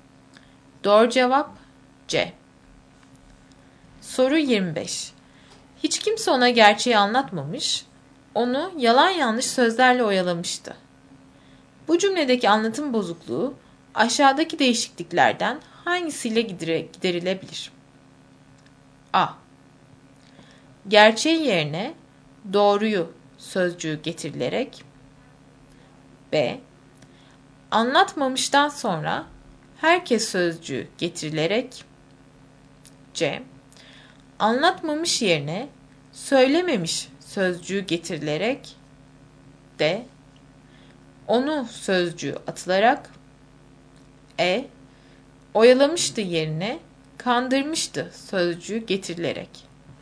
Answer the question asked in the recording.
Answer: Doğru cevap B.